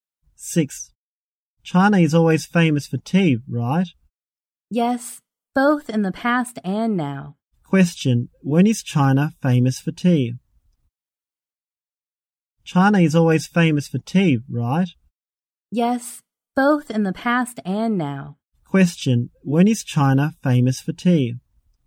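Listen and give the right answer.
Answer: Both in the past and now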